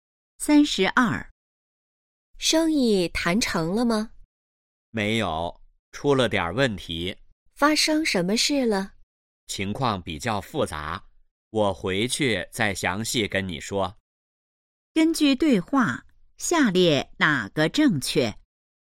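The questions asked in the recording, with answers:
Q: 根据对话,下列哪个正确?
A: 生意没谈成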